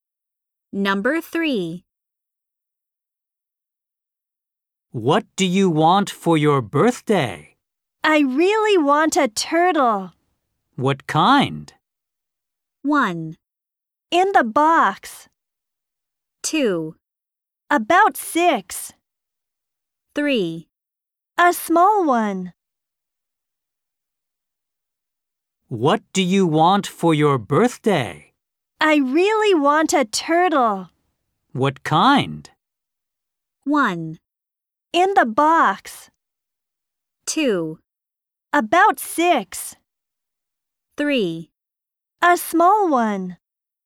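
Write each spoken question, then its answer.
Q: What kind?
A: 3: A small one.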